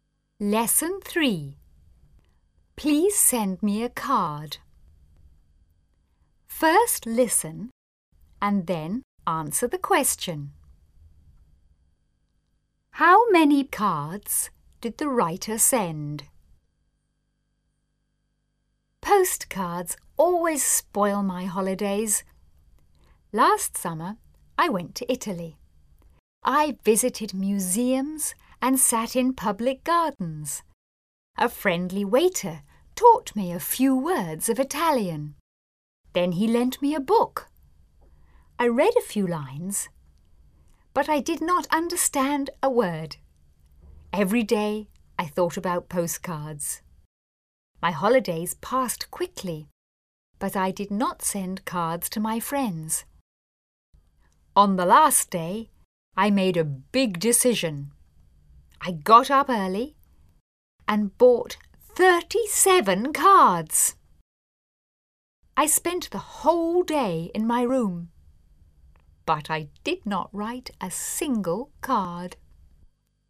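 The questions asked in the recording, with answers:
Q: How many cards did the writer send?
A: None; the writer did not send any cards.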